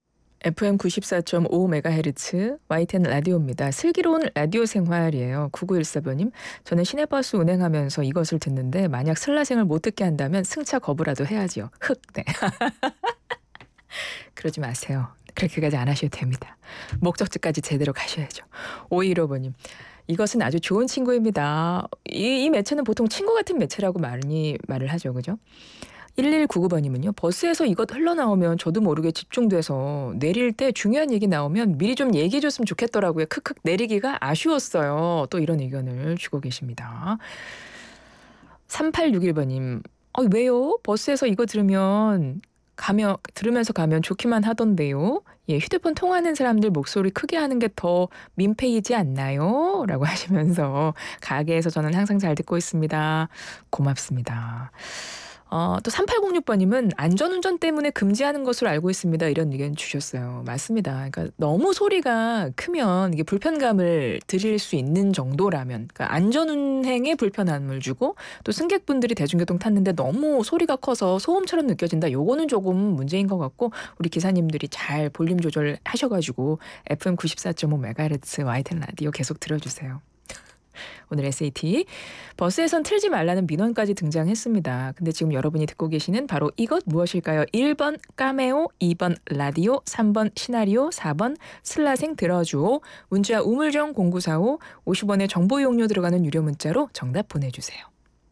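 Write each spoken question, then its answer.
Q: 근데 지금 여러분이 듣고 계시는 바로 이것 무엇일까요?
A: 2: 라디오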